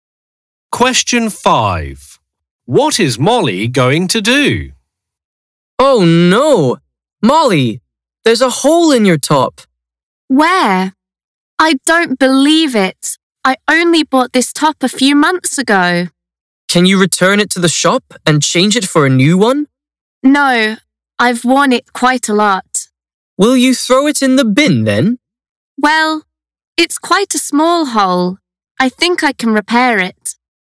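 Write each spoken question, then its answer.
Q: What is Molly going to do?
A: repair her top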